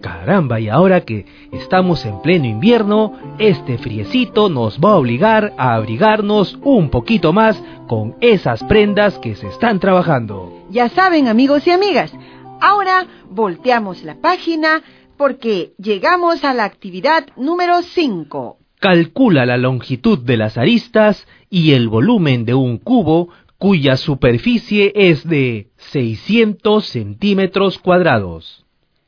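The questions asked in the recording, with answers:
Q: Calcula la longitud de las aristas y el volumen de un cubo cuya superficie es de 600 centímetros cuadrados.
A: Arista 10 cm, volumen 1000 cm3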